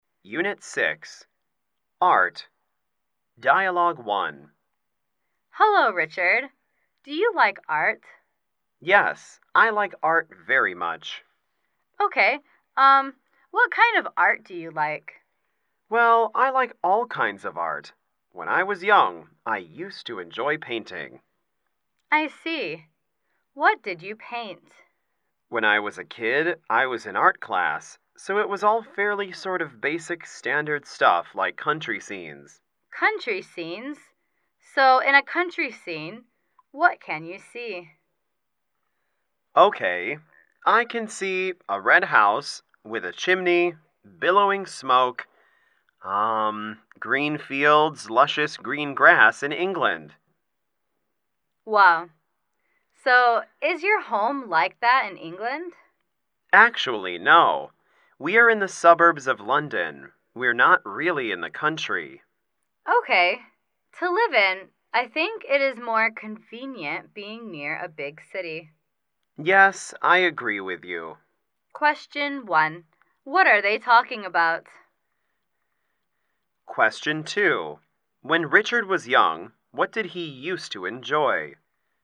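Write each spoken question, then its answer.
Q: What are they talking about?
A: Art

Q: When Richard was young, what did he used to enjoy?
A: Painting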